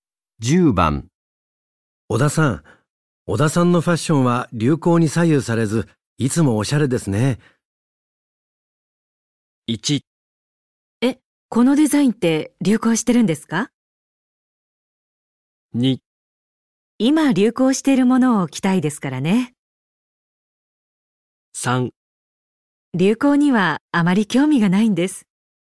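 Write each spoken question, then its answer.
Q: 小田さん、小田さんのファッションは流行に左右されず、いつもおしゃれですね。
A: 3: 流行にはあまり興味がないんです。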